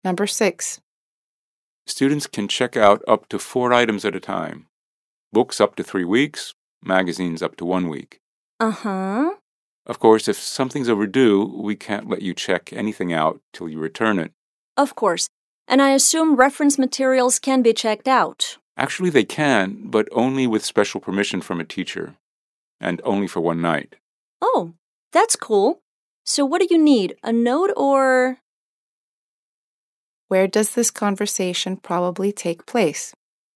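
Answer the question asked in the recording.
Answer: In a library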